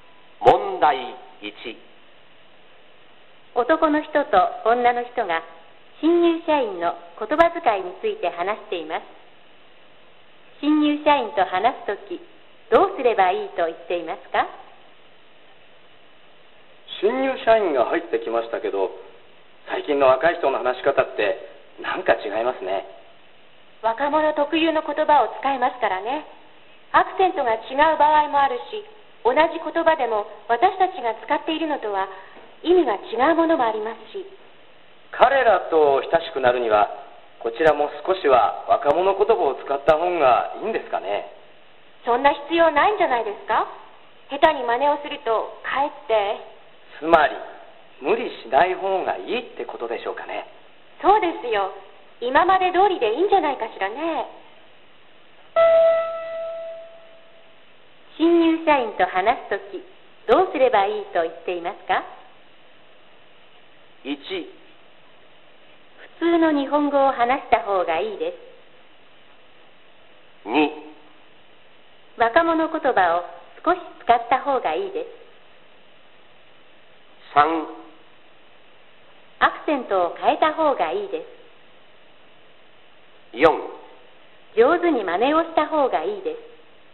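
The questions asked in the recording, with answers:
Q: 新入社員と話す時どうすればいいと言っていますか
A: 1: 普通の日本語を話した方がいいです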